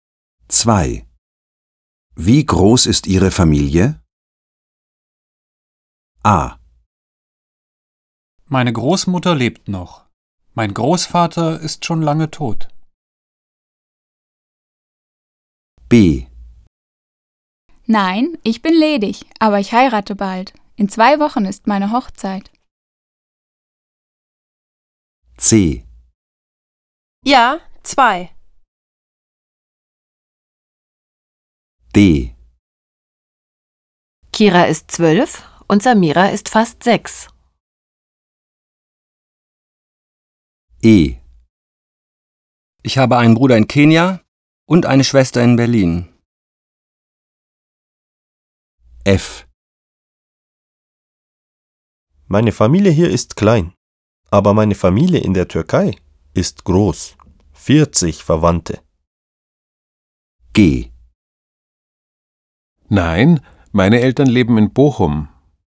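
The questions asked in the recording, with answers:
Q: Wie groß ist Ihre Familie?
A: F: Meine Familie hier ist klein, aber meine Familie in der Türkei ist groß. 40 Verwandte.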